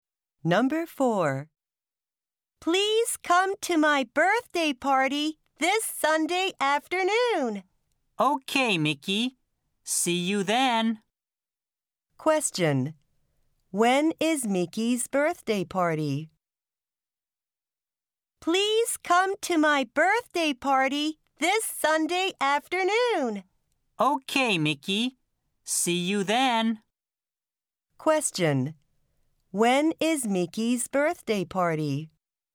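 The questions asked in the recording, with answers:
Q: When is Mickey's birthday party?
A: This Sunday afternoon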